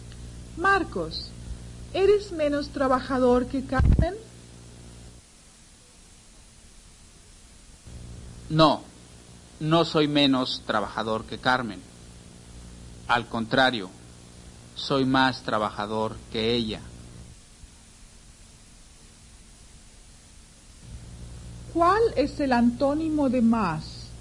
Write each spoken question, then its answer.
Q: ¿Cuál es el antónimo de más?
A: el antónimo de más es menos.